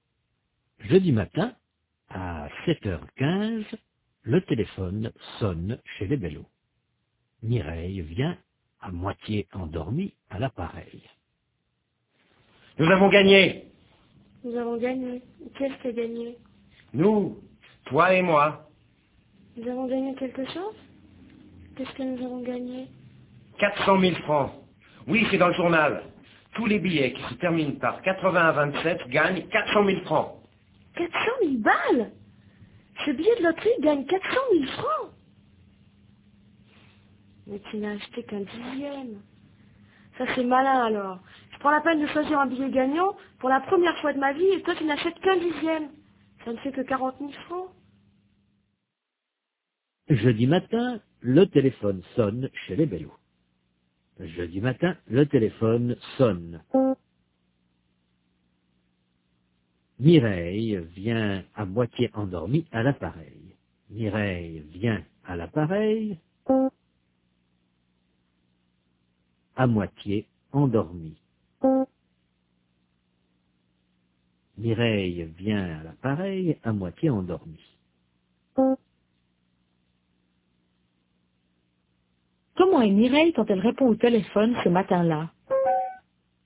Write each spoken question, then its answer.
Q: Comment est Mireille quand elle répond au téléphone ce matin-là?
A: Elle est à moitié endormie.